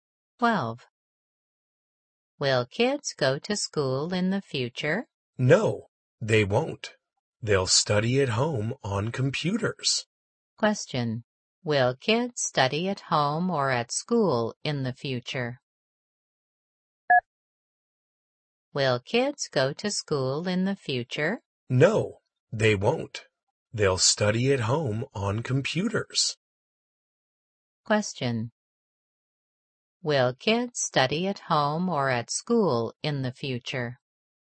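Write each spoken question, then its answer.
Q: Will kids study at home or at school in the future?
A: At home on computers.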